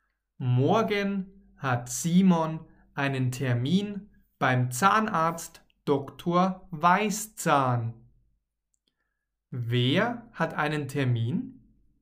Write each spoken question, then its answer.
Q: Wer hat einen Termin?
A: Simon. Simon hat einen Termin.